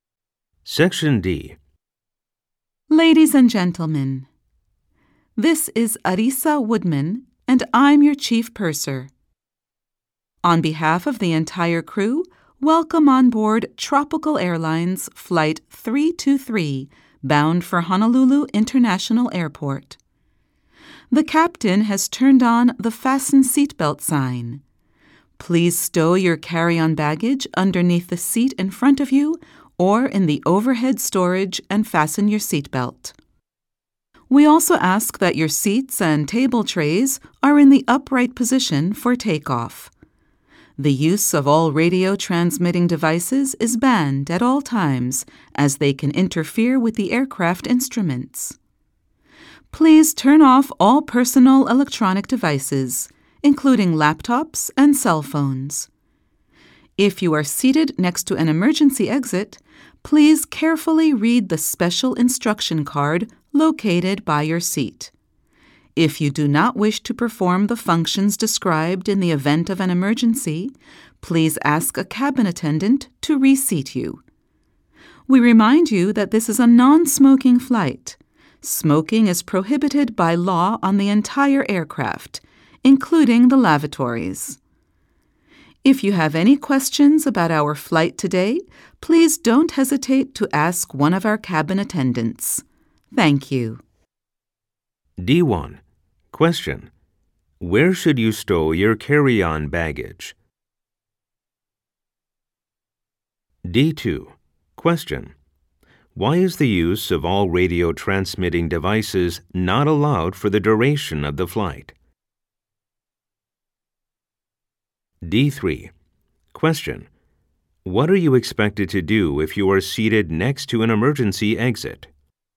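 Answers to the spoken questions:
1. Underneath the seat in front of you or in the overhead storage
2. They can interfere with the aircraft instruments
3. Carefully read the special instruction card by your seat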